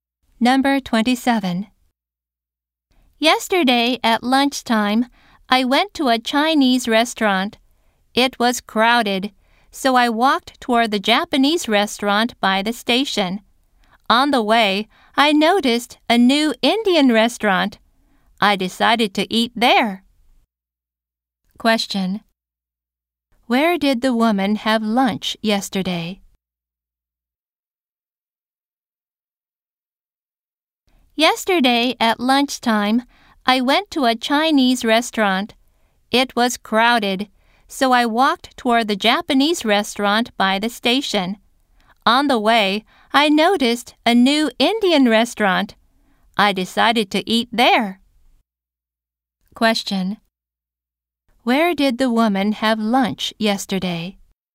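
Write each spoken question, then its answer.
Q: Where did the woman have lunch yesterday?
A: At a new Indian restaurant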